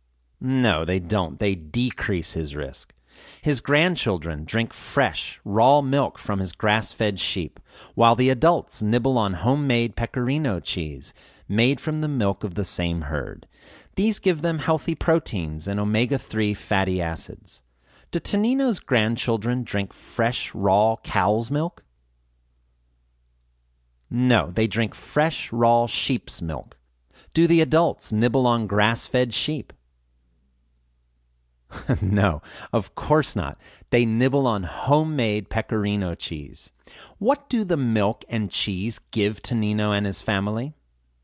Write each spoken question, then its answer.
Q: What do the milk and cheese give Tonino and his family?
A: They give them healthy proteins and omega-3 fatty acids.